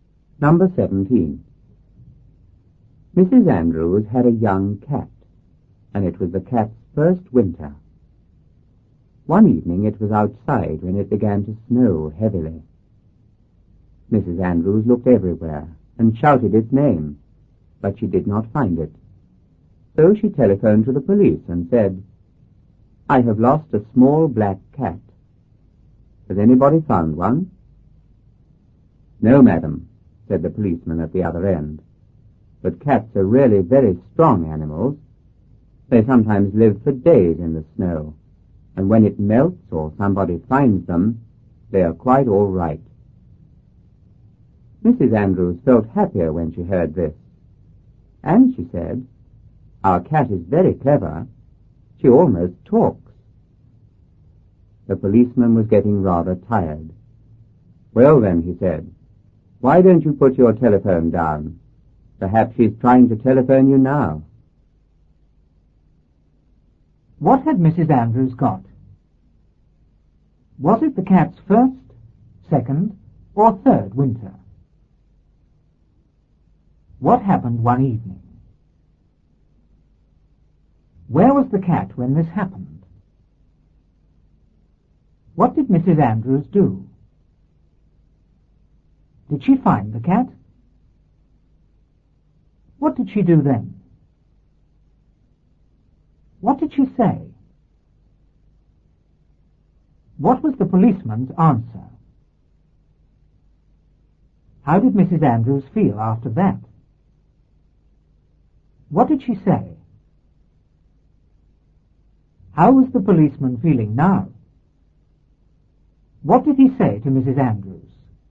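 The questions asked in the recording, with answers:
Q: What had Mrs. Andrews got?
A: A young cat

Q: Was it the cat's first, second, or third winter?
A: Its first winter

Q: What happened one evening?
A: It began to snow heavily

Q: Where was the cat when this happened?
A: Outside

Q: What did Mrs. Andrews do?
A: She looked everywhere and shouted its name

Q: Did she find the cat?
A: No

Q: What did she do then?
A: She telephoned the police

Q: What did she say?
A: I have lost a small black cat. Has anybody found one?

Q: What was the policeman's answer?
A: No, but cats are very strong and sometimes live for days in the snow

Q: How did Mrs. Andrews feel after that?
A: Happier

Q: What did she say?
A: Our cat is very clever. She almost talks.

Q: How was the policeman feeling now?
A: Rather tired

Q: What did he say to Mrs. Andrews?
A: Put your telephone down; perhaps she's trying to telephone you now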